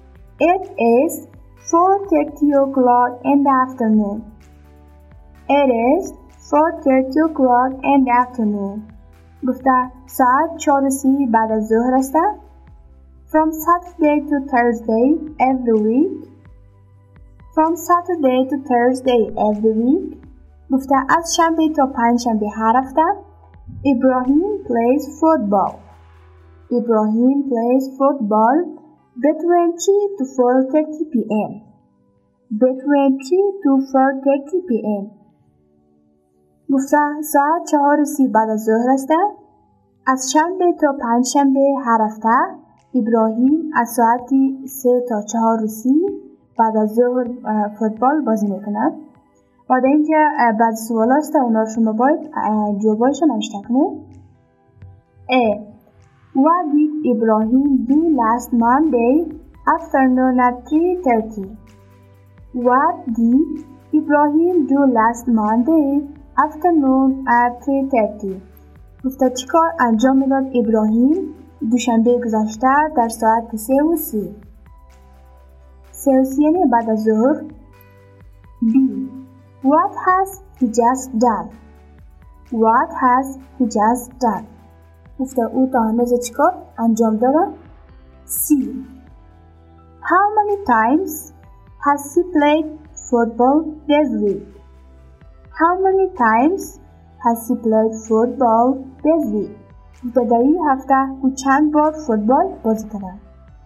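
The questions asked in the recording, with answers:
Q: What did Ibrahim do last Monday afternoon at 3.30.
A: He played football.

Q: What has he just done?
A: He has just played football.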